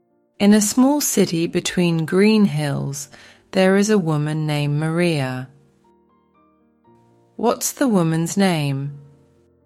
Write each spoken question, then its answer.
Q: What's the woman's name?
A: Maria. Her name's Maria.